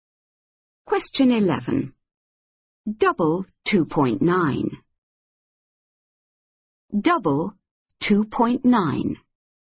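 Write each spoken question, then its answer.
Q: Double 2.9.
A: 5.8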